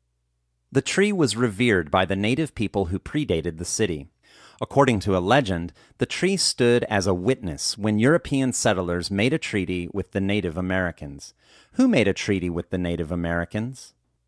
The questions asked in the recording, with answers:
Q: Who made a treaty with the Native Americans?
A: The European settlers made a treaty with the Native Americans.